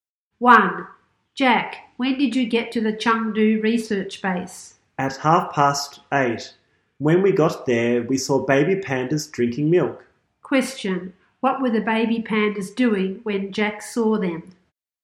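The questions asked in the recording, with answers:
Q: what were the baby pandas doing when Jack saw them?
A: Drinking milk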